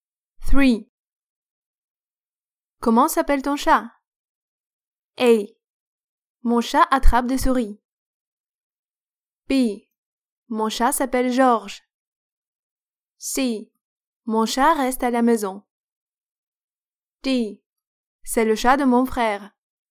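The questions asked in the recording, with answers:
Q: Comment s'appelle ton chat?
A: B: Mon chat s'appelle Georges.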